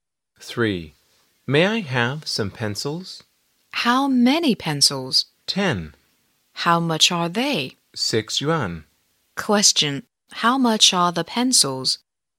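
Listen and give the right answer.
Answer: Six yuan.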